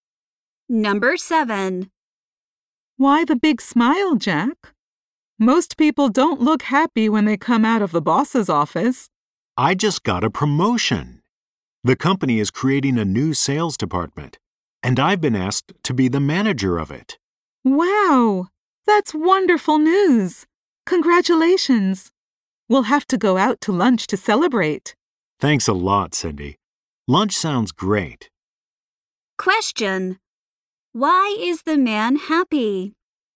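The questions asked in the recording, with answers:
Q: Why is the man happy?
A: He got a promotion to manager of a new sales department.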